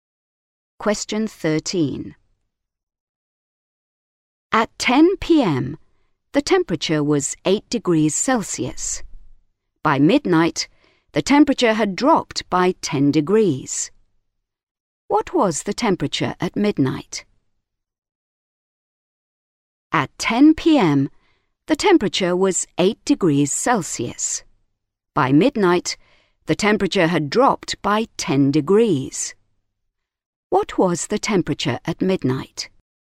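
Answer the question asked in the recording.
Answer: -2 degrees Celsius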